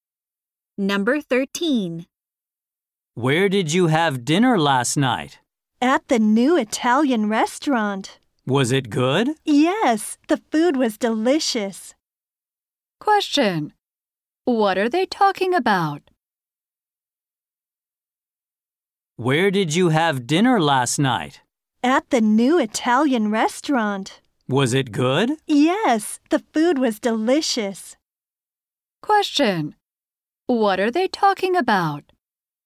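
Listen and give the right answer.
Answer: A restaurant where one had dinner last night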